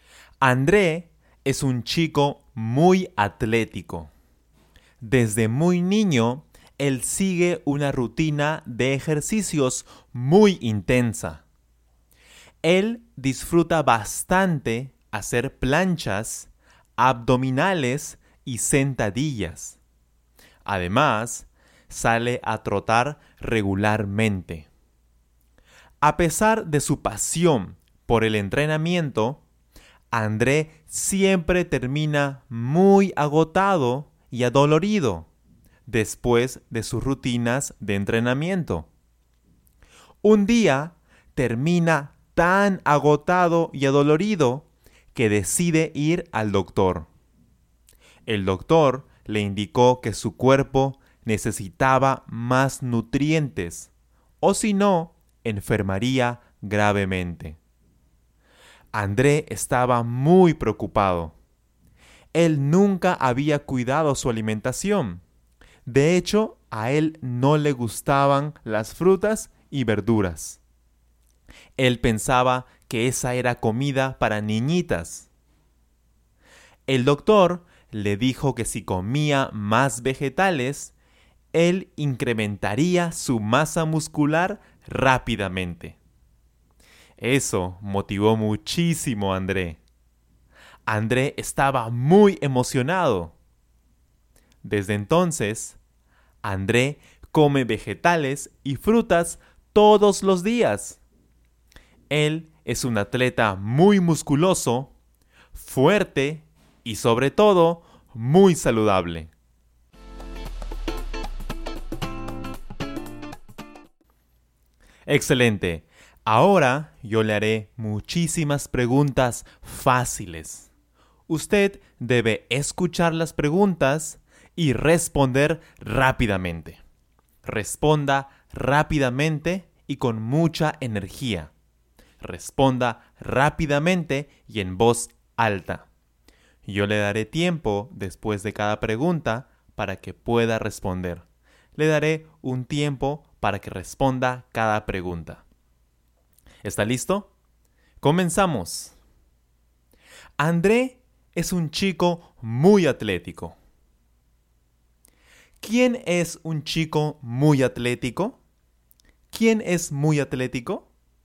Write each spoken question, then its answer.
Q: ¿Quién es un chico muy atlético?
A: Genial. André. André es un chico muy atlético.